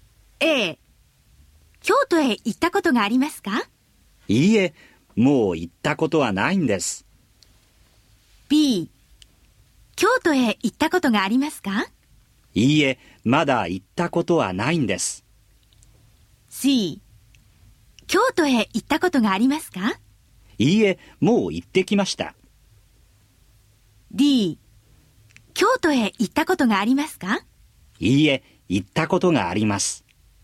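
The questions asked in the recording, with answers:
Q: 京都へ行ったことがありますか?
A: B: いいえ、まだ行ったことはないんです。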